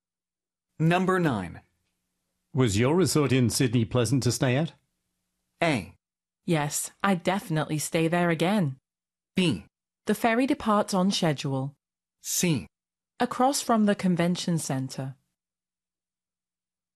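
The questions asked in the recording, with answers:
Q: Was your resort in Sydney pleasant to stay at?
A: A: Yes, I'd definitely stay there again.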